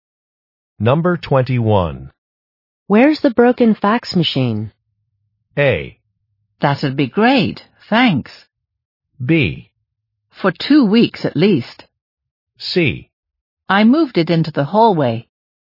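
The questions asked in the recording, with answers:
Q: Where's the broken fax machine?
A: C: I moved it into the hallway.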